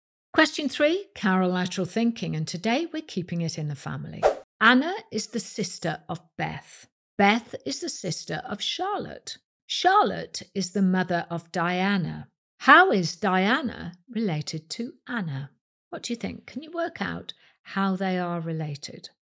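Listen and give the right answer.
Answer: She is Anna's niece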